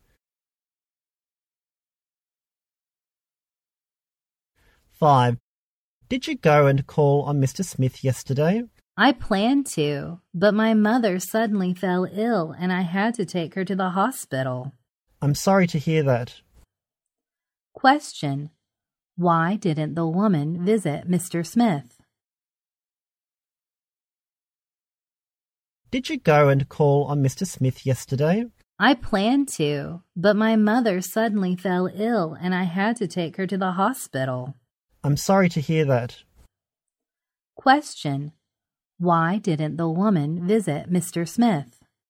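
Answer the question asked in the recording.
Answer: Her mother fell ill and she had to take her to the hospital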